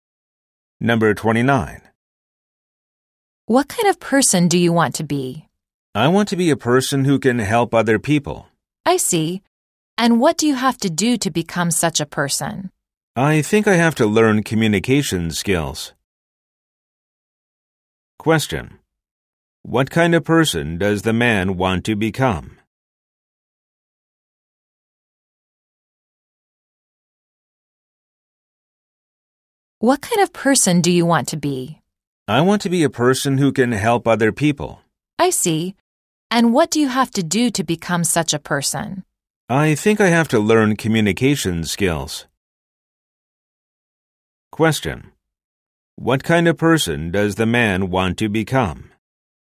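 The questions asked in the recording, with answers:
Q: What kind of person does the man want to become?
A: A person who can help other people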